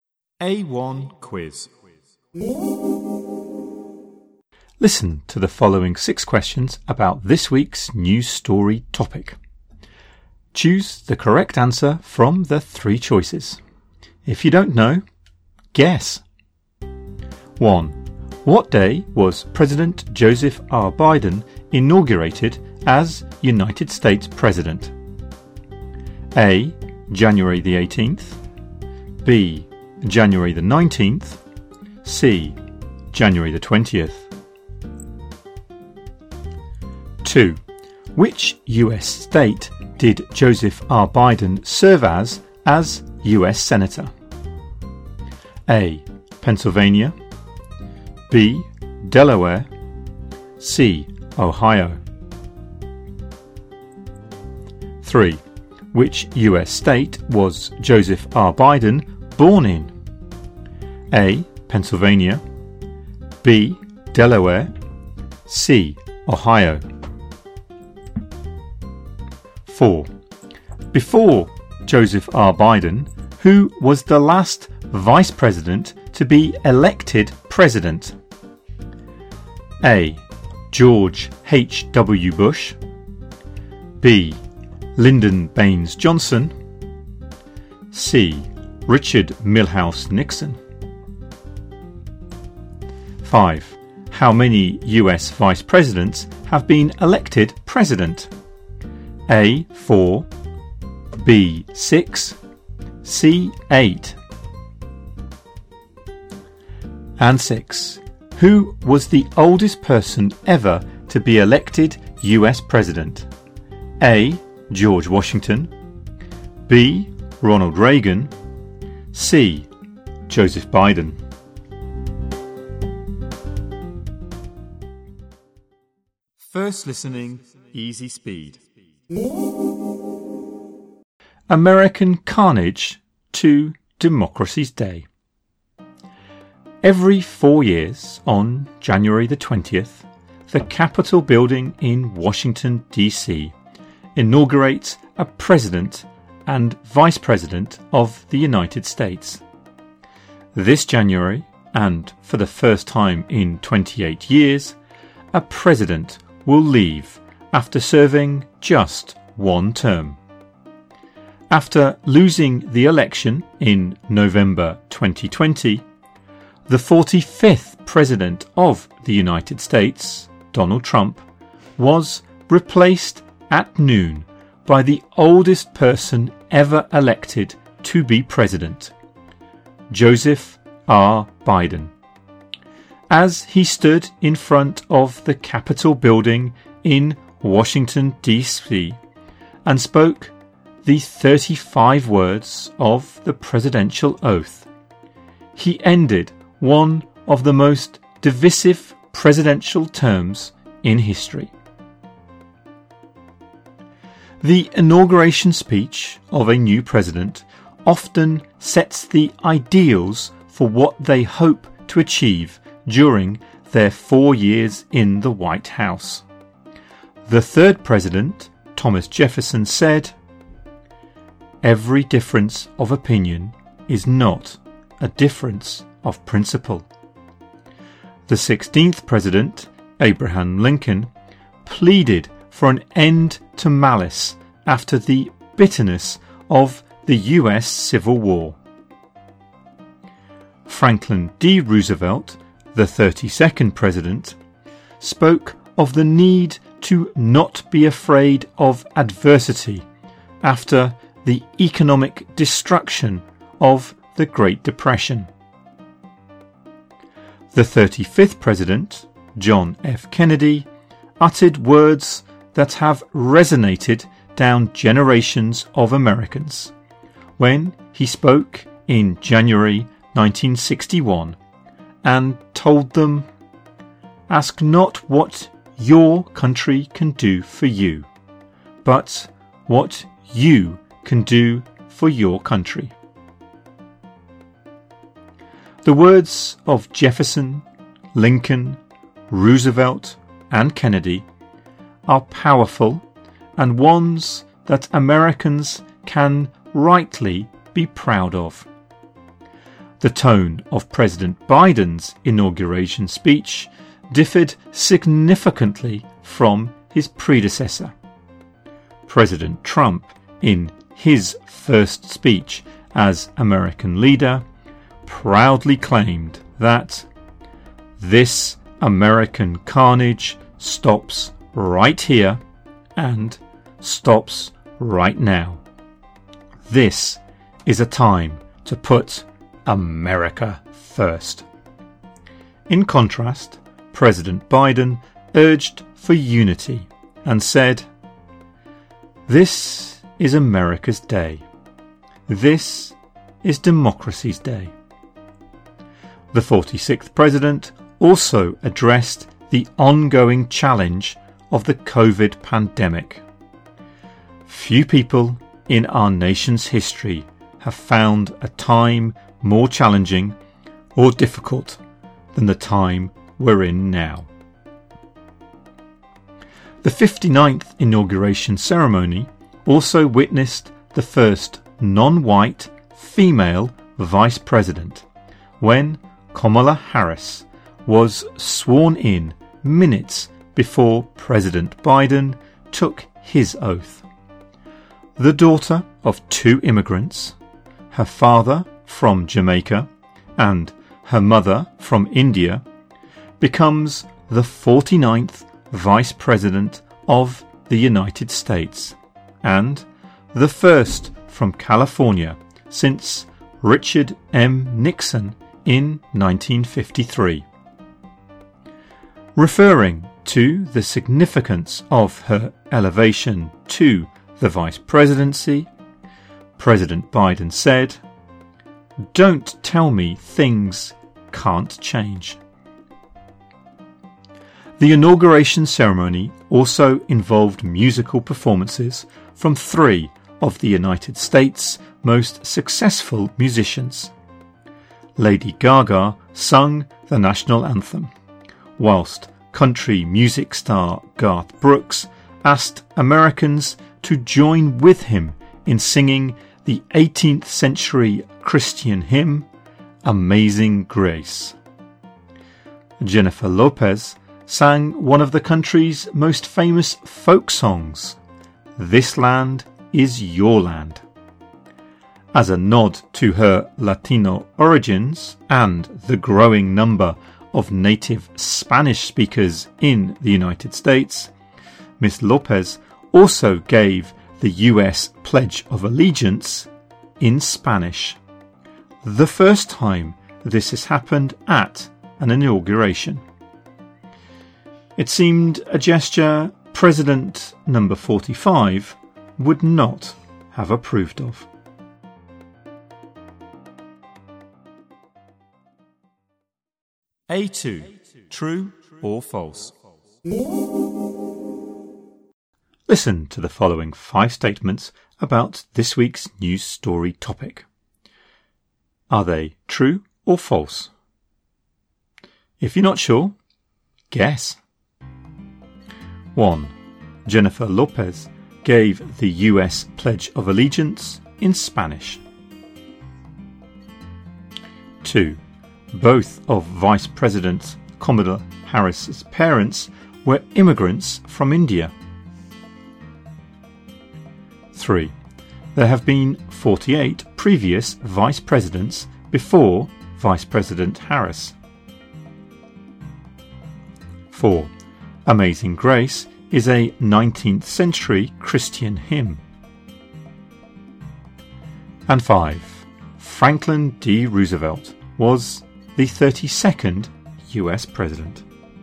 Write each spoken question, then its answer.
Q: What day was President Joseph R. Biden inaugurated as United States President?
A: 1C

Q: who was the oldest person ever to be elected US President?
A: 6C

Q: Jennifer Lopez gave the US Pledge of Allegiance in Spanish.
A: 1. True

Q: There have been 48 previous vice presidents before Vice President Harris.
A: 3. True.

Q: Amazing Grace is a 19th century Christian hymn.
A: 4. False.

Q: Franklin D. Roosevelt was the 32nd US President.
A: 5. True.